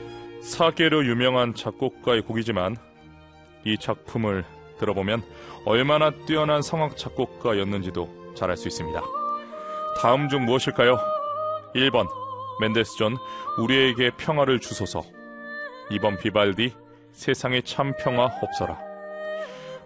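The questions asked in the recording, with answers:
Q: 다음 중 무엇일까요? 1번 멘델스존 우리에게 평화를 주소서, 2번 비발디 세상에 참 평화 없어라.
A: 2: 비발디 세상에 참 평화 없어라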